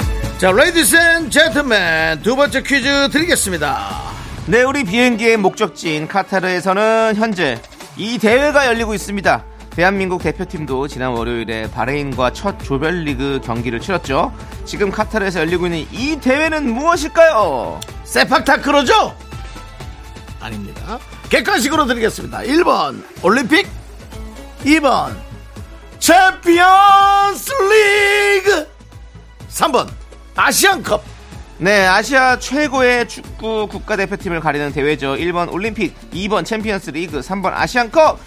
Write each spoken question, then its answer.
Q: 지금 카타르에서 열리고 있는 이 대회는 무엇일까요?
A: 두 번째 퀴즈 정답은 3번 아시안컵이었습니다.